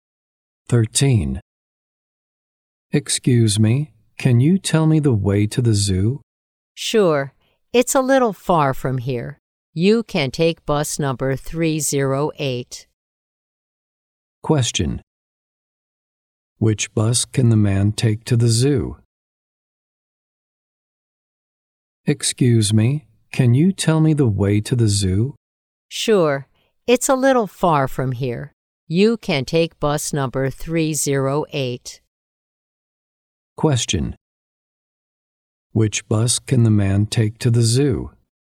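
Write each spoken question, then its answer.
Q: Which bus can the man take to the zoo?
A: Bus number 308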